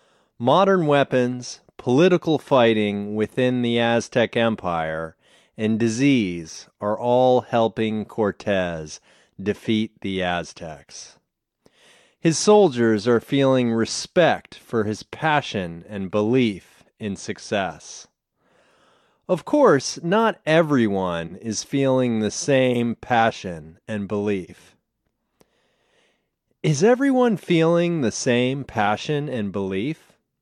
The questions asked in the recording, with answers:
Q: Is everyone feeling the same passion and belief?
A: No, not everyone is feeling the same passion and belief.